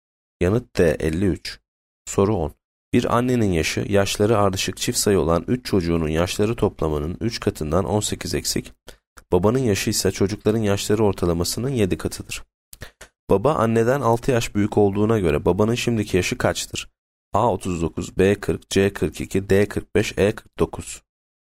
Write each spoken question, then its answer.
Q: Baba anneden 6 yaş büyük olduğuna göre babanın şimdiki yaşı kaçtır?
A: Yanıt C 42.